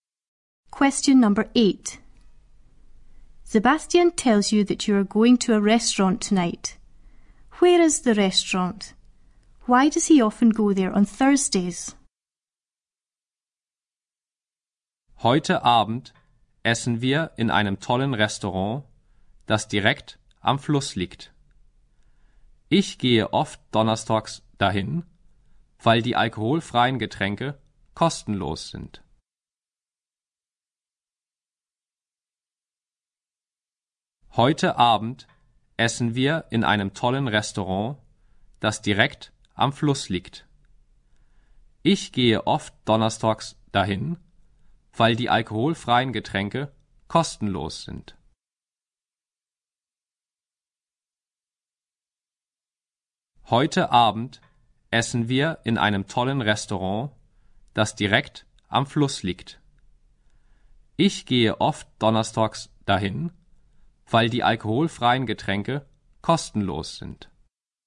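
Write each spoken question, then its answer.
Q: Where is the restaurant?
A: Right beside the river

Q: Why does he often go there on Thursdays?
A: The soft drinks are free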